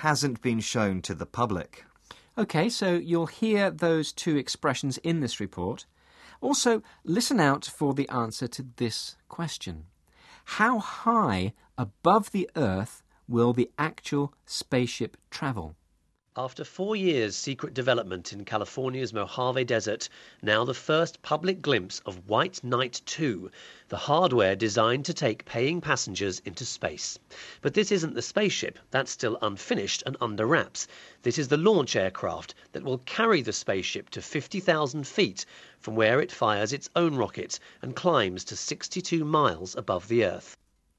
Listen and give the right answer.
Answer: It'll be 62 miles, which is about 100 kilometres.